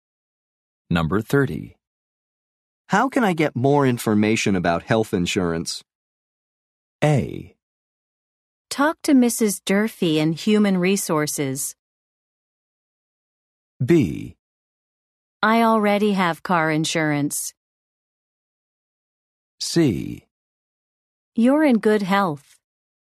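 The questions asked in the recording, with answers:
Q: How can I get more information about health insurance?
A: A: Talk to Mrs. Durfee in Human Resources.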